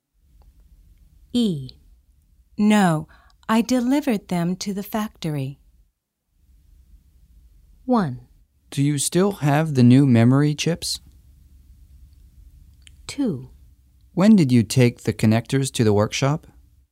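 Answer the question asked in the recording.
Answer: 1: Do you still have the new memory chips?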